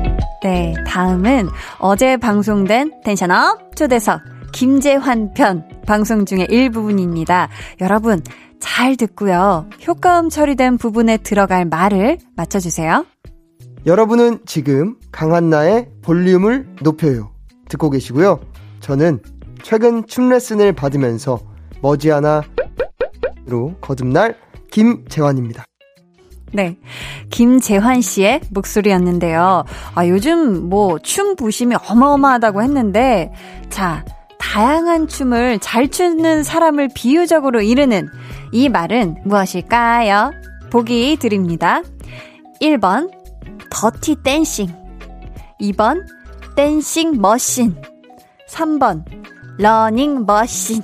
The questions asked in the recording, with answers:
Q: 자, 다양한 춤을 잘 추는 사람을 비유적으로 이르는 이 말은 무엇일까요?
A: 2번 댄싱 머신이었습니다.